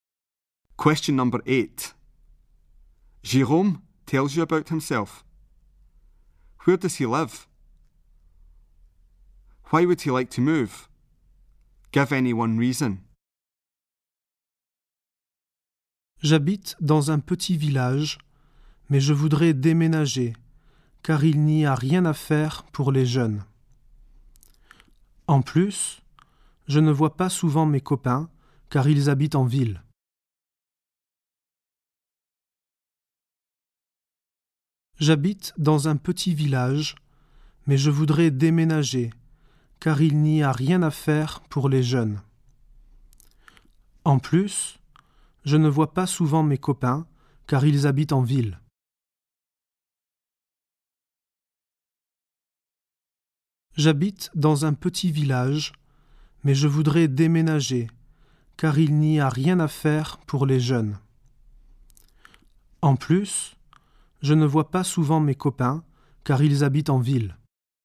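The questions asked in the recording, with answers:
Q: Where does he live?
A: In a small village

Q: Why would he like to move?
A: Nothing for young people to do / his friends live in town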